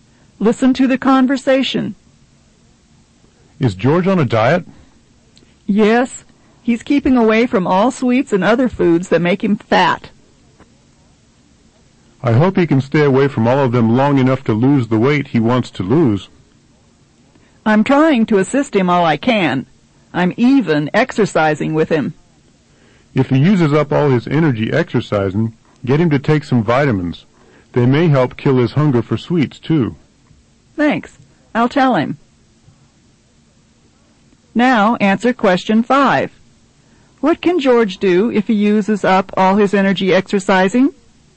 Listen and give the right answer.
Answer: he can take vitamins.